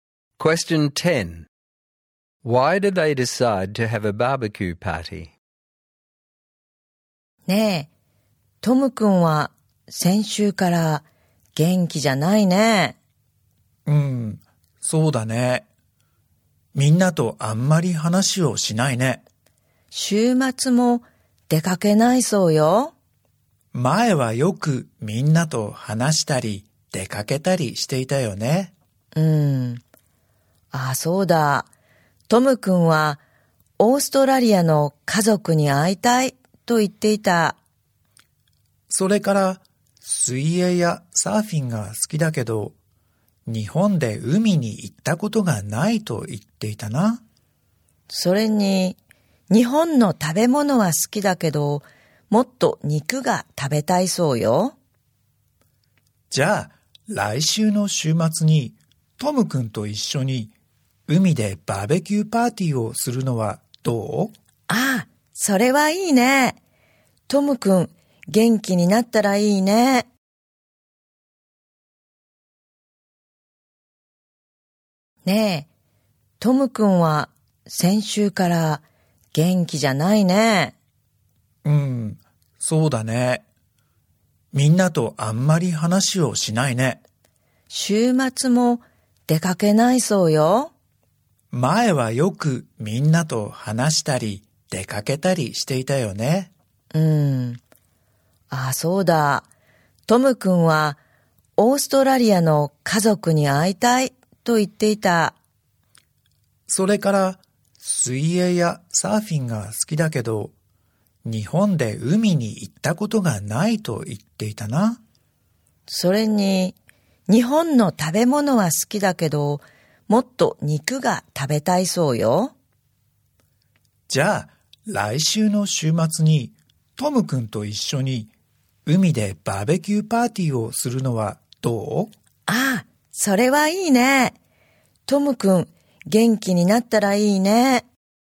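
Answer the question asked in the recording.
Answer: To cheer Tom up: he has been down since last week, likes swimming and surfing but hasn't been to the sea in Japan, and wants to eat more meat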